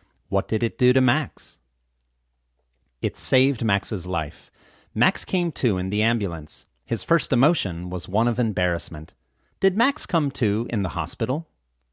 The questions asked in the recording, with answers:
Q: Did Max come to in the hospital?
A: No, Max didn't come to in the hospital.